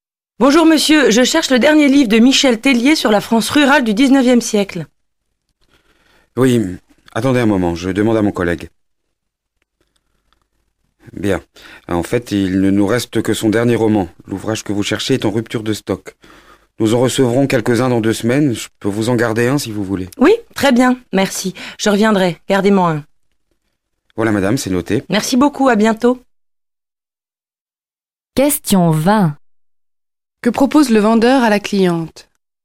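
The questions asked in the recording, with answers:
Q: Que propose le vendeur à la cliente?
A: De lui garder un exemplaire du livre, qui arrivera dans 2 semaines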